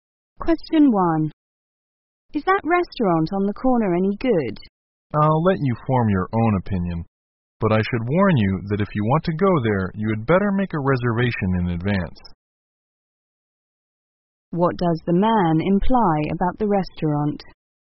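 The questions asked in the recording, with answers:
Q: What does the man imply about the restaurant?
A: It is popular; reservations are needed in advance.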